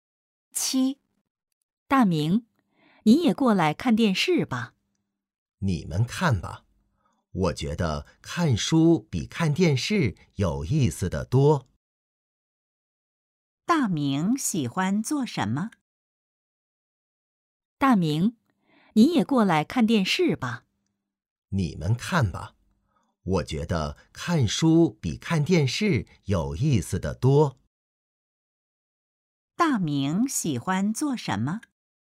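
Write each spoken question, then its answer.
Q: 大明喜欢做什么?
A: 看书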